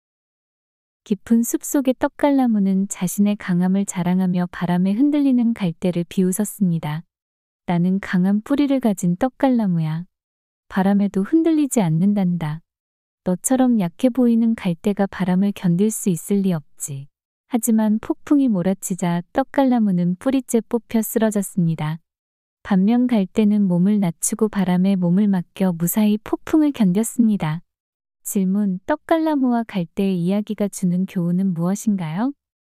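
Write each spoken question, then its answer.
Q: 떡갈나무와 갈대의 이야기가 주는 교훈은 무엇인가요?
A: 강함을 자랑하기보다 겸손하고 유연하게 상황에 맞추는 것이 더 강하다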